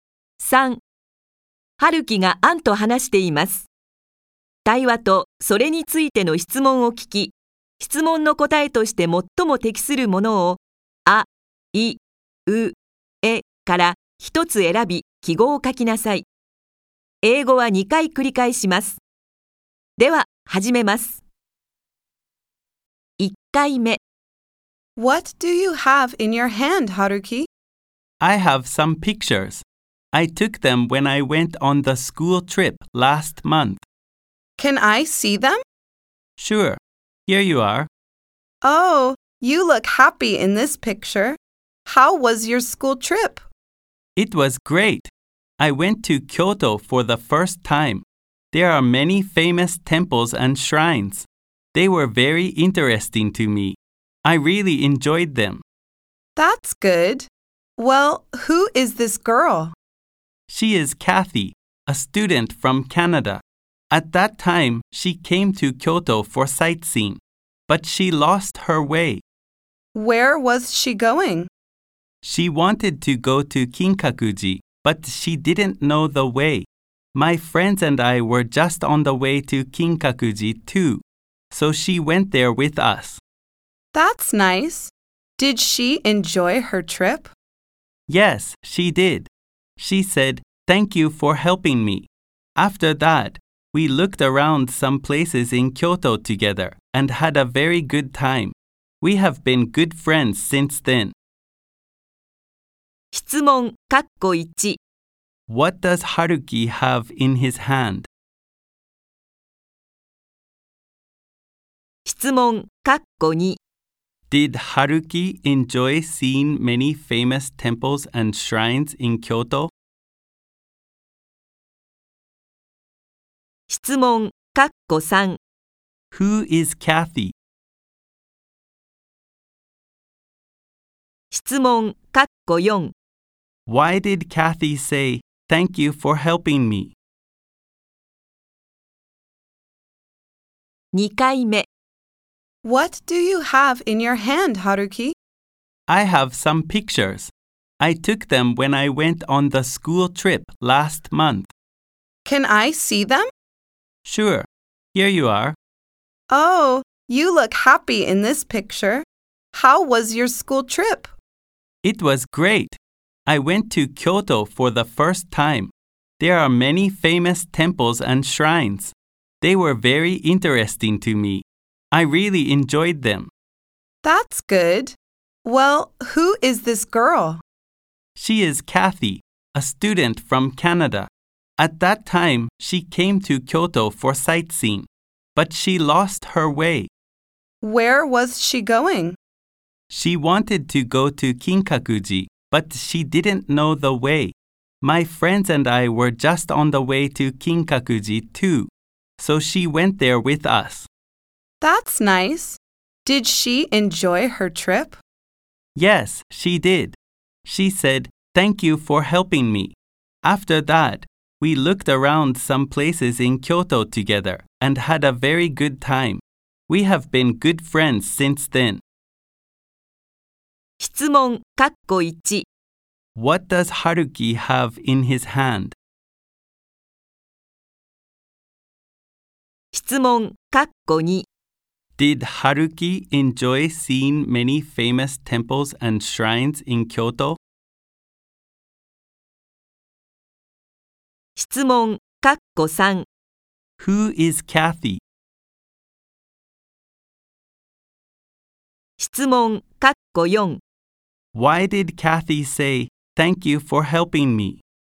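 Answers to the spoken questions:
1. Some pictures from his school trip
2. Yes, he did.
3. A student from Canada
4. Because Haruki and his friends took her to Kinkakuji when she was lost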